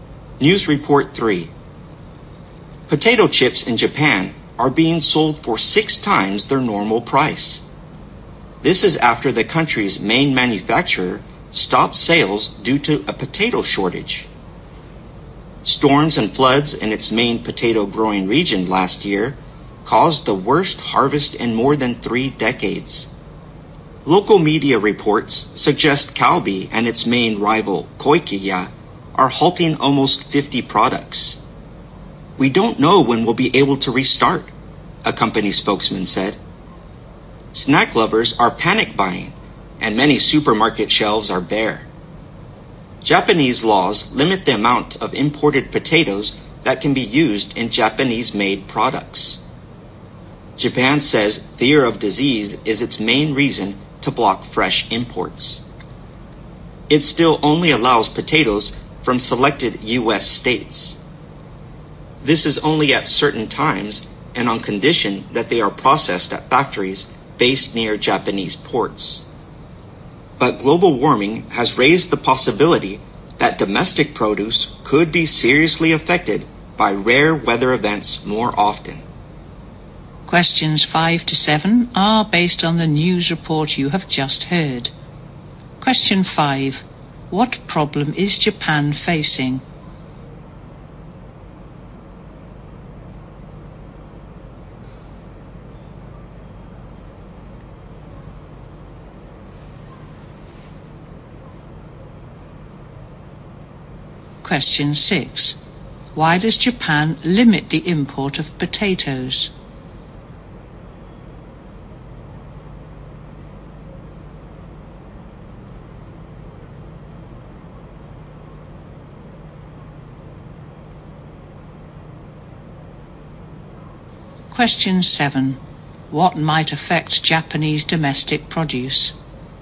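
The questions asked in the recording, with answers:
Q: What problem is Japan facing?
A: A potato shortage

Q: Why does Japan limit the import of potatoes?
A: Fear of disease

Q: What might affect Japanese domestic produce?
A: Rare weather events caused by global warming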